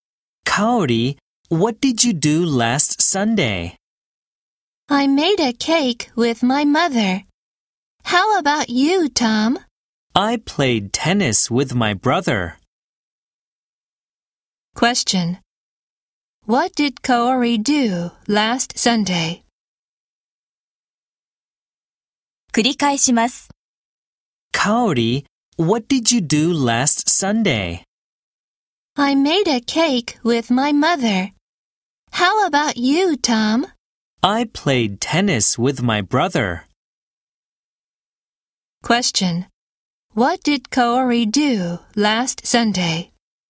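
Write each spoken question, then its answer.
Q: What did Kaori do last Sunday?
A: She made a cake with her mother.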